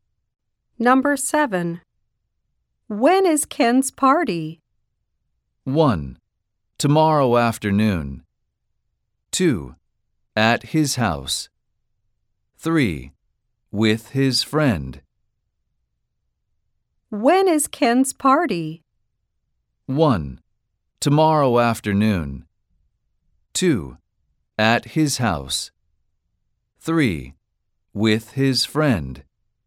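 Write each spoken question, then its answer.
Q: When is Ken's party?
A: 1: Tomorrow afternoon.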